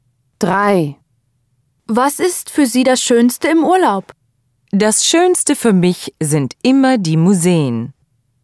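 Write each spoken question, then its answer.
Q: Was ist für Sie das Schönste im Urlaub?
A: Die Museen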